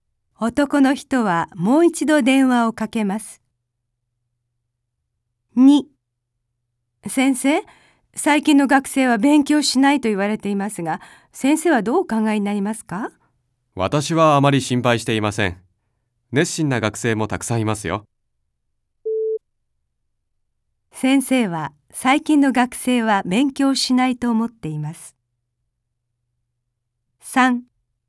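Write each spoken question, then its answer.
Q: 先生は最近の学生は勉強しないと思っています。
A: いいえ(熱心な学生もたくさんいると思っています)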